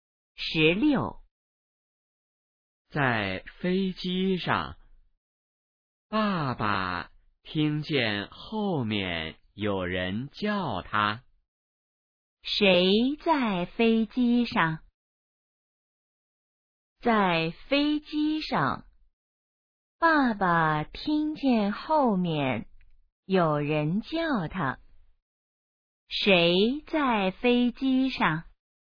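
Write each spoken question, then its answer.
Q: 谁在飞机上?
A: 爸爸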